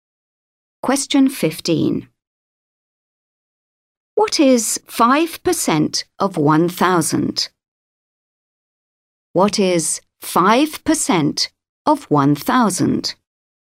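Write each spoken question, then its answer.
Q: What is 5% of 1,000?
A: 50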